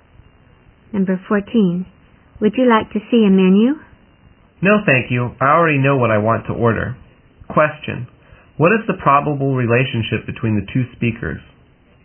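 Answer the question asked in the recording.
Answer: Waiter and customer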